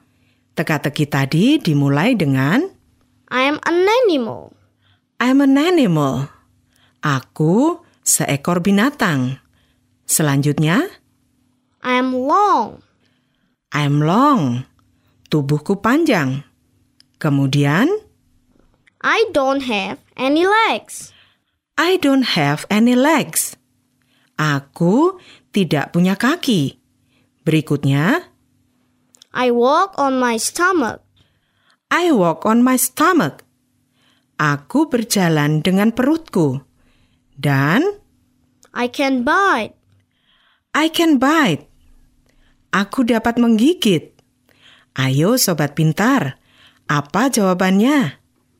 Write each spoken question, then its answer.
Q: Ayo, sobat pintar. Apa jawabannya?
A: Benar sekali. Binatang itu adalah seekor ular atau a snake.